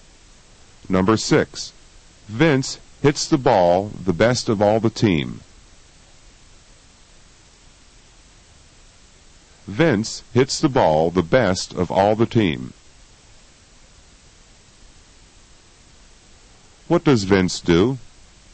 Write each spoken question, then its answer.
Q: What does Vince do?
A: He hits the ball the best of all the team.